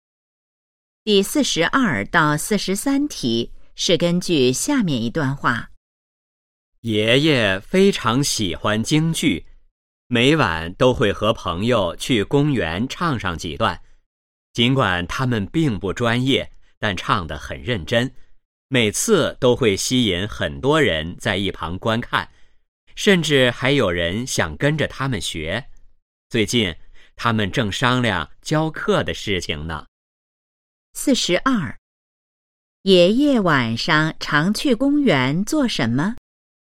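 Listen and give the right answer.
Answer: 和朋友唱京剧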